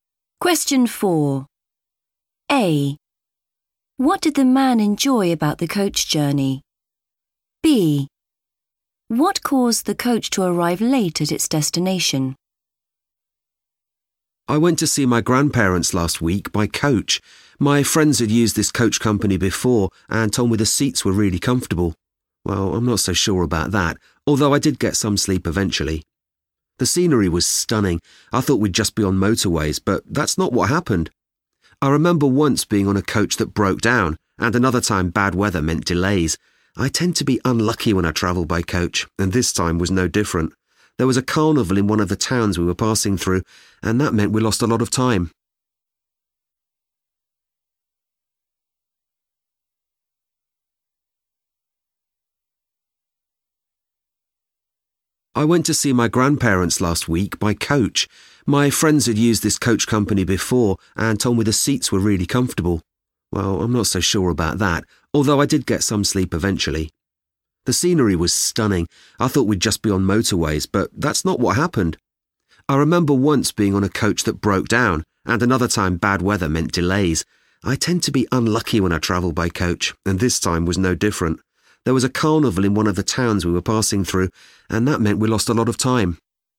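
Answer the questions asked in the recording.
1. the scenery
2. a carnival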